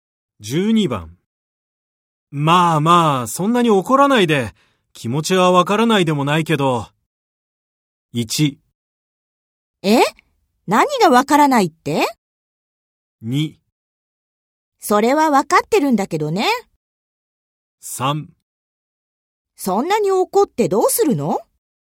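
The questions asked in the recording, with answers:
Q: まあまあ、そんなに怒らないで、気持ちはわからないでもないけど。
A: 2: それはわかってるんだけどね。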